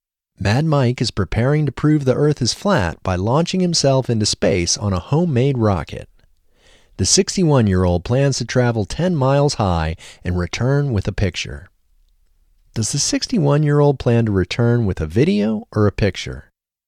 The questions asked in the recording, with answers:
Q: Does the 61-year-old plan to return with a video or a picture?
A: The 61-year-old plans to return with a picture.